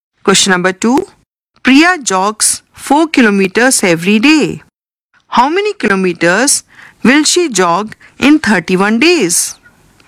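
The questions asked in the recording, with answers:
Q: How many kilometers will she jog in 31 days?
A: 124 kilometers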